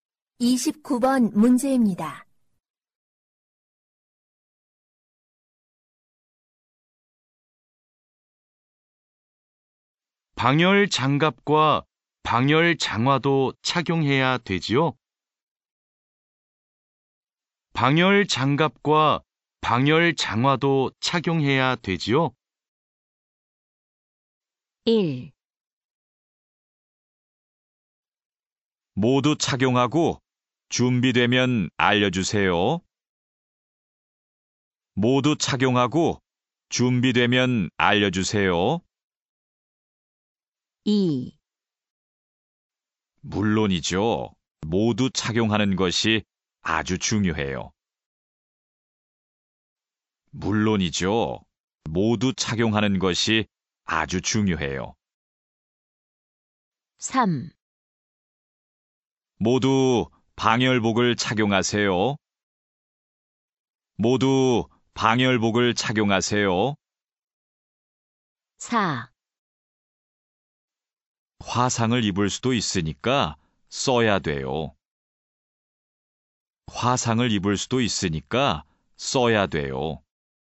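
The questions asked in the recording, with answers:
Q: 방열 장갑과 방열 장화도 착용해야 되지요?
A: 2: 물론이죠. 모두 착용하는 것이 아주 중요해요.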